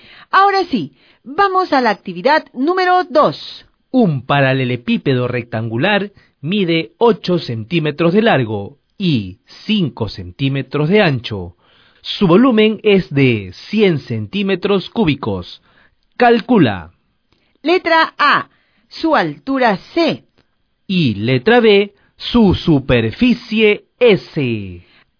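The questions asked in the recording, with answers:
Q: Letra A, su altura C.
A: 2,5 cm

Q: Y letra B, su superficie S.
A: 145 cm2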